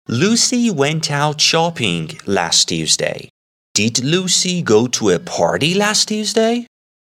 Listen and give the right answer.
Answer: No, Lucy went out shopping last Tuesday.